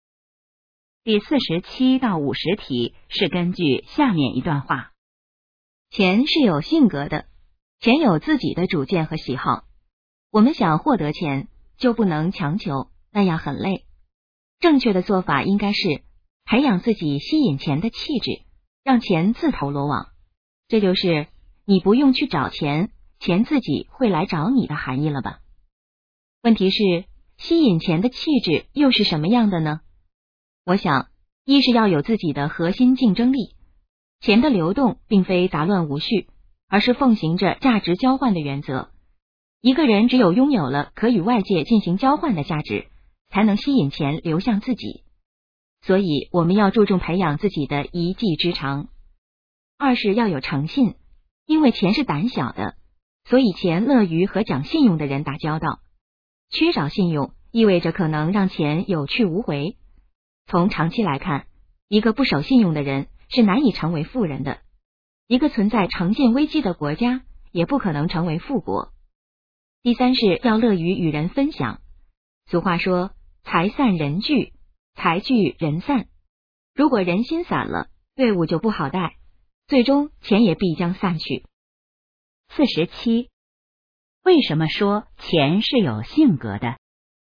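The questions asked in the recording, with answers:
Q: 为什么说钱是有性格的?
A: 因为钱有自己的主见和喜好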